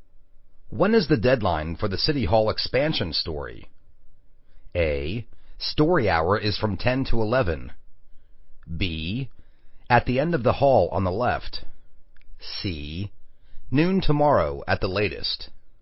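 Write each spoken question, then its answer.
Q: When is the deadline for the City Hall expansion story?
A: C: Noon tomorrow at the latest.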